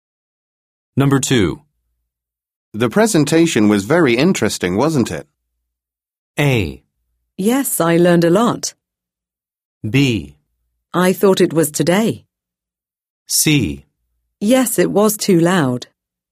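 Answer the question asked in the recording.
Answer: A: Yes, I learned a lot.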